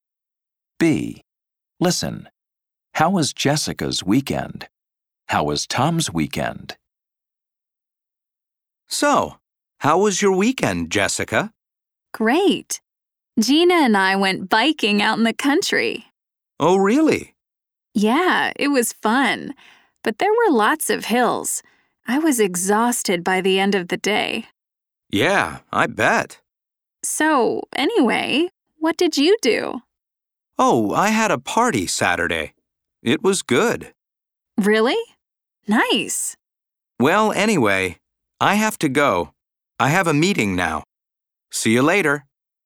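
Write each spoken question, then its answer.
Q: How was Jessica's weekend?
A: Great, fun but tiring; she went biking in the country with Gina and was exhausted.

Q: How was Tom's weekend?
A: Good; he had a party on Saturday.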